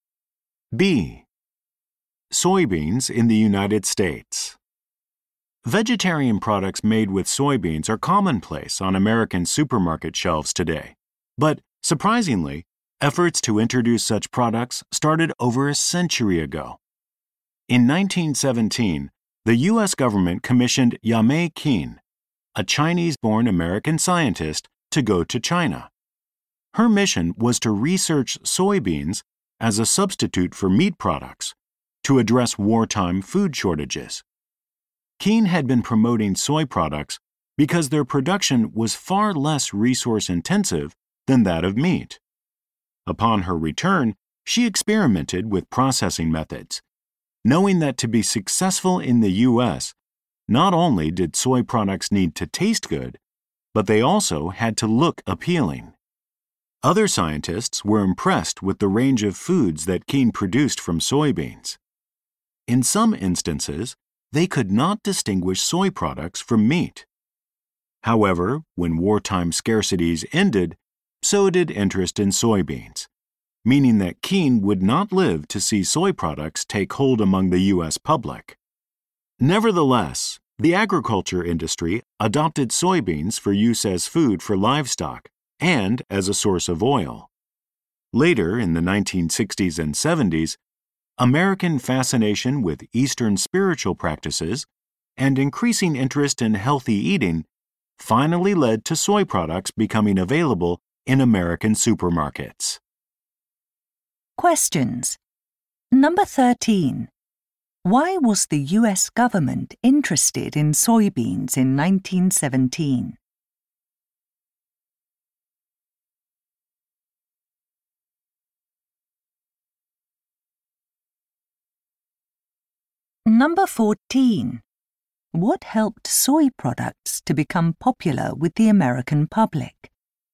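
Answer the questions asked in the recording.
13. As a meat substitute to deal with wartime food shortages
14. Interest in Eastern spiritual practices and healthy eating in the 1960s and 70s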